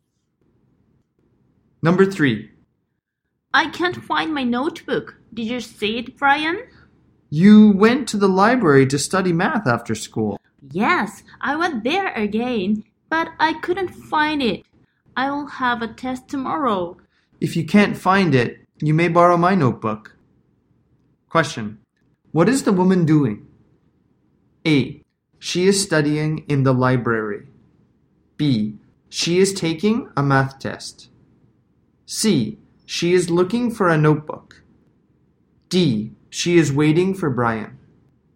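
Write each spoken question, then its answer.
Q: What is the woman doing?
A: C: She is looking for a notebook.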